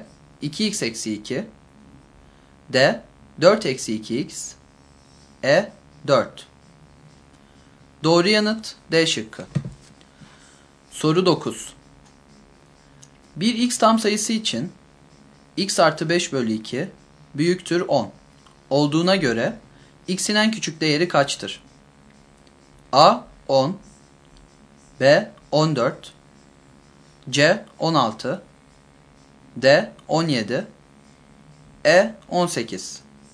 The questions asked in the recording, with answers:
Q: Bir x tam sayısı için x artı 5 bölü 2 büyüktür 10 olduğuna göre x'in en küçük değeri kaçtır?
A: Doğru yanıt C şıkkı.